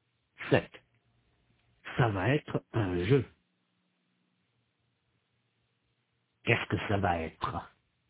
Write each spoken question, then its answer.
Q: Qu'est-ce que ça va être?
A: Un jeu. Ça va être un jeu.